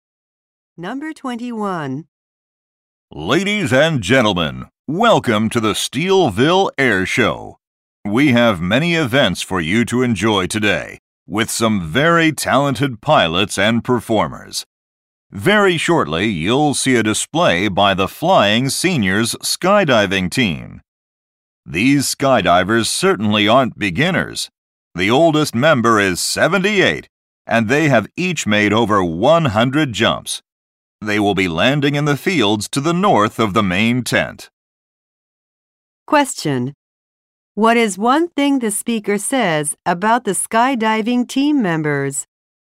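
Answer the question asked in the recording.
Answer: They have each made over 100 jumps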